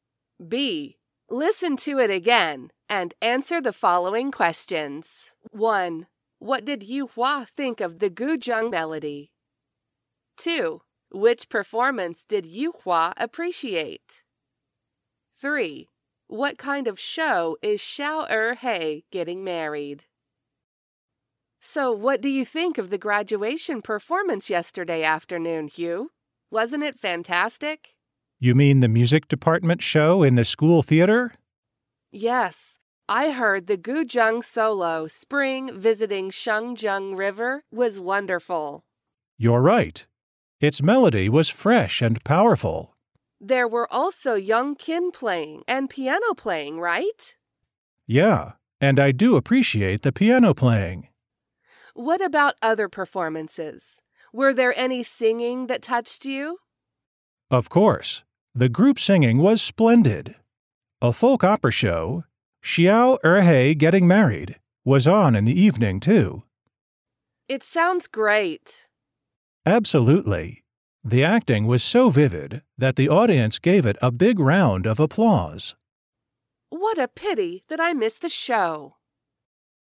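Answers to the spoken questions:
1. Fresh and powerful
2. The piano playing
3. A folk opera show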